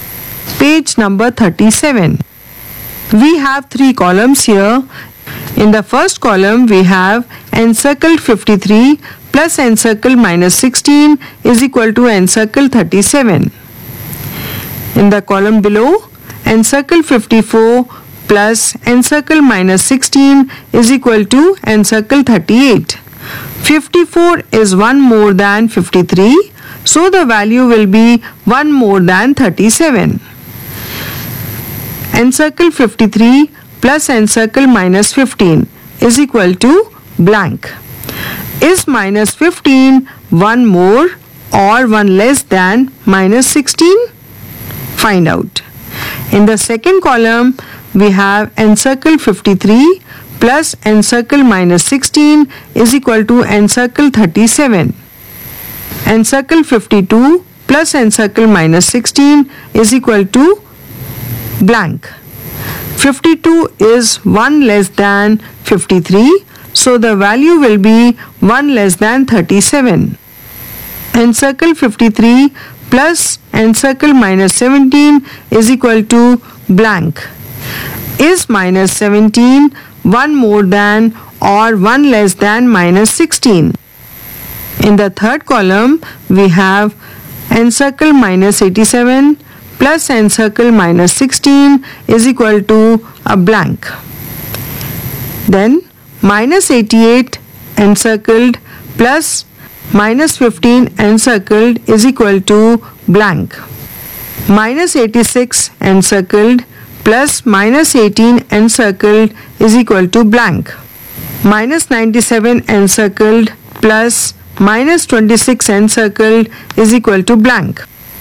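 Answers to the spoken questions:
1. 38
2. 36
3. 36
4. -103
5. -103
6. -104
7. -123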